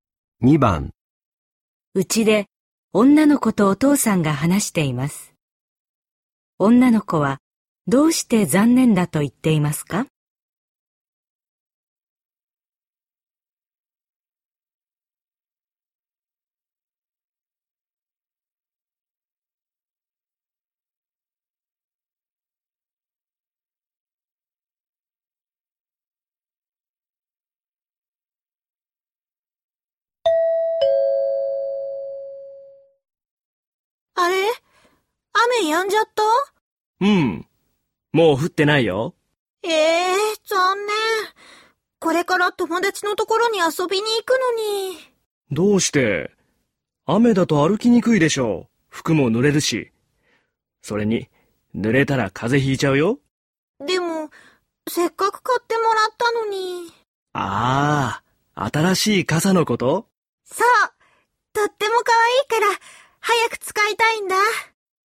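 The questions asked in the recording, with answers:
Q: 女の子はどうして残念だと言っていますか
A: 新しい傘が使えないから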